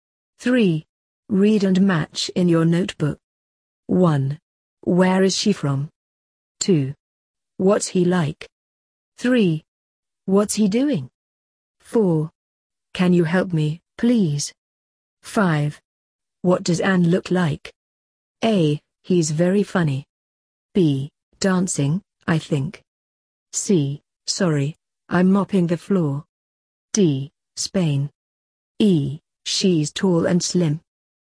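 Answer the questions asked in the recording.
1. D: Spain.
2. A: He's very funny.
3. B: Dancing, I think.
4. C: Sorry, I'm mopping the floor.
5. E: She's tall and slim.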